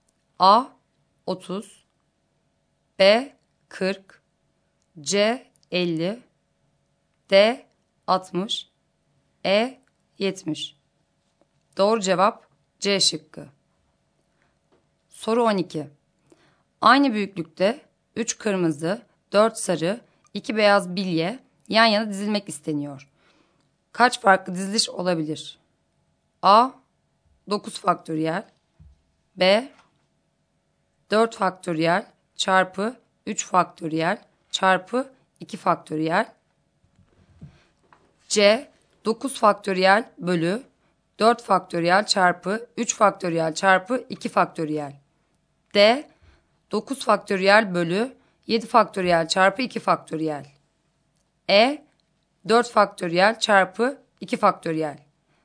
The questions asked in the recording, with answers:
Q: Kaç farklı diziliş olabilir?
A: Doğru cevap C şıkkı.